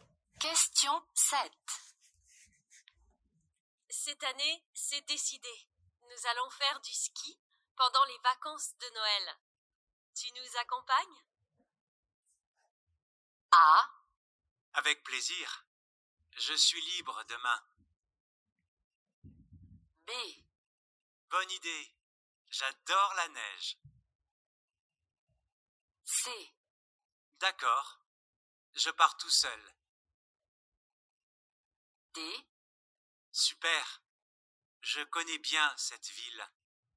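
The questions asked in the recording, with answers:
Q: Tu nous accompagnes?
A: B: Bonne idée. J'adore la neige.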